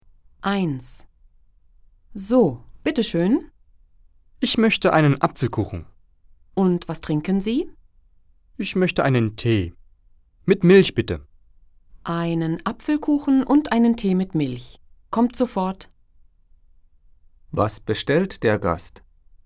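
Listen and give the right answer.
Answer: Einen Apfelkuchen und einen Tee mit Milch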